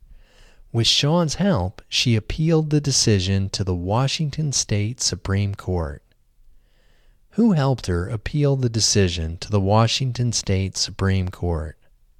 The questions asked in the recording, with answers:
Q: Who helped her appeal the decision to the Washington State Supreme Court?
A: Sean helped her appeal the decision to the Washington State Supreme Court.